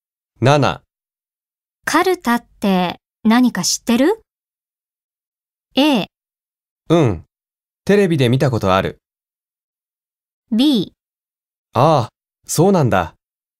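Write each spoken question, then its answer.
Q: カルタって何か知ってる?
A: A: うん、テレビで見たことある。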